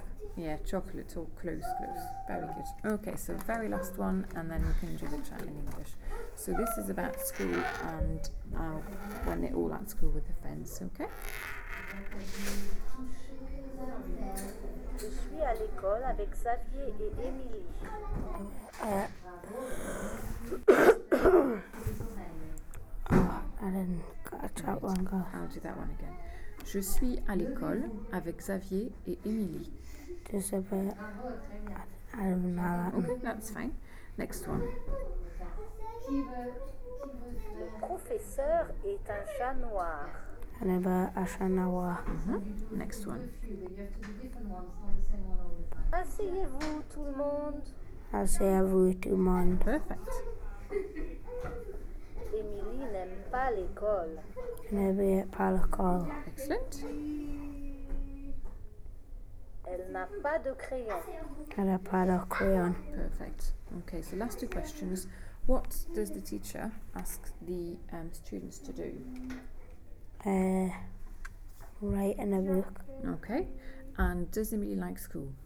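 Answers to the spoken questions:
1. Sit down
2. No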